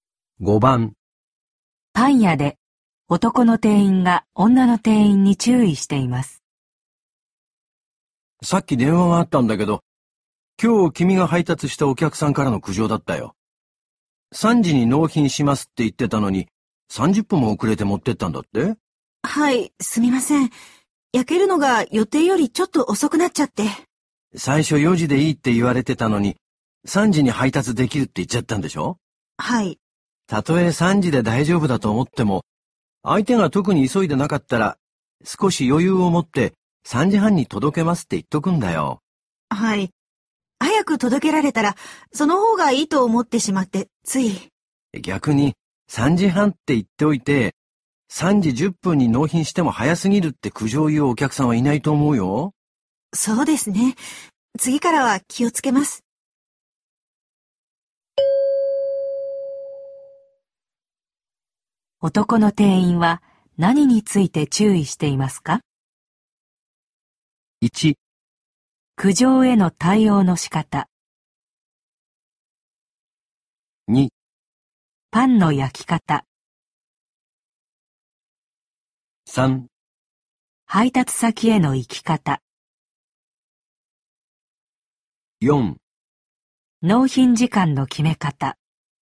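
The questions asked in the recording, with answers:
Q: 男の店員は何について注意していますか?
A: 4: 納品時間の決め方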